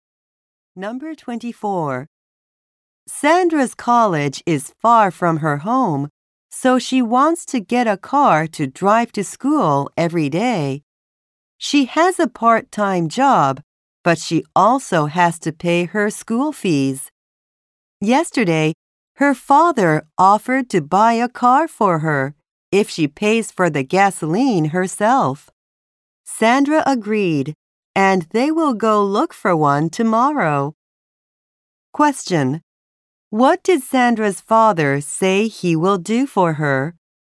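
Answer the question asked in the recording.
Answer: Buy her a car.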